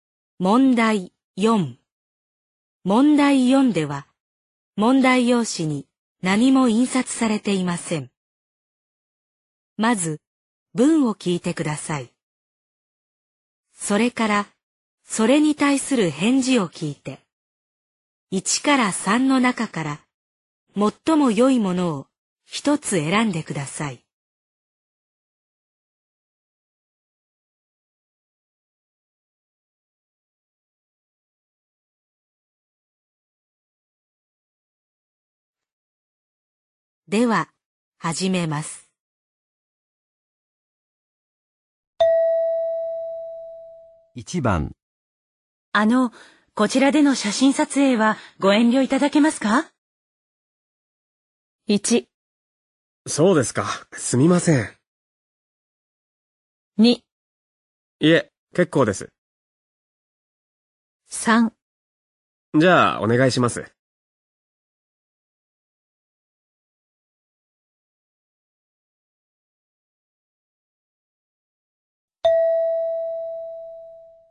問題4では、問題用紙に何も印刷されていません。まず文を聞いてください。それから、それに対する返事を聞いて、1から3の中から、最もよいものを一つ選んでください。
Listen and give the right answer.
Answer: 1

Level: N2